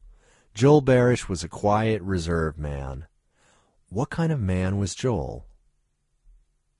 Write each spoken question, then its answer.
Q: What kind of man was Joel?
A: Joel was a quiet, reserved man.